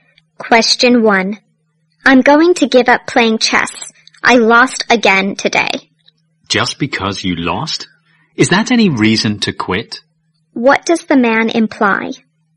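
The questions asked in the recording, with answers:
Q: What does the man imply?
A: Losing a game is no reason to give up playing chess.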